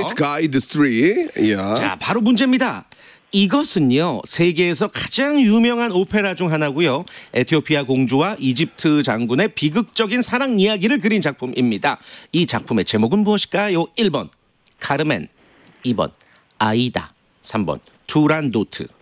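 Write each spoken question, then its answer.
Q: 이 작품의 제목은 무엇일까요?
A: 2: 아이다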